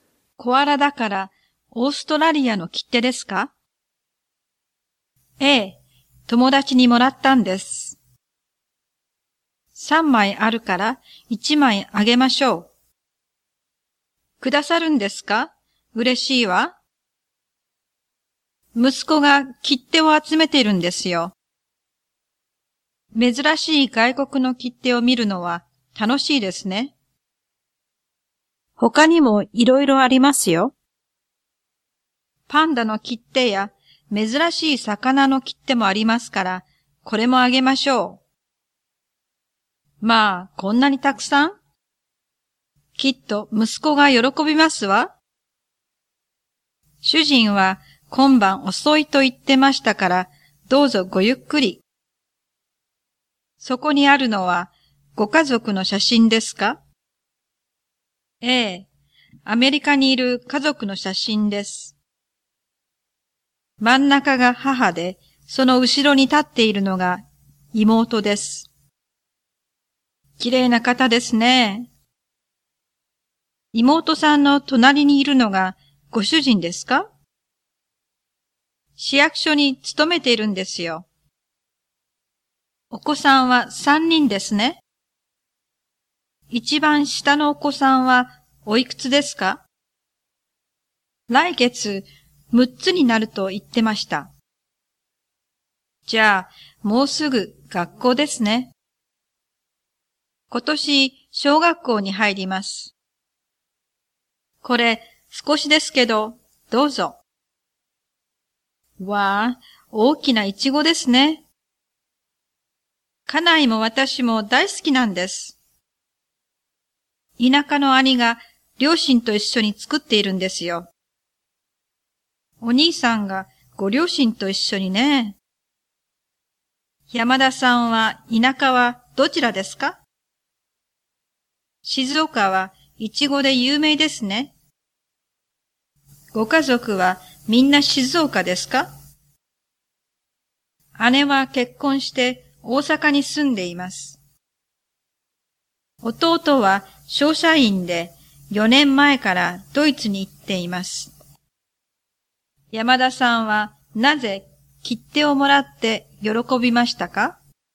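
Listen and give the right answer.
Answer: 息子が切手を集めているから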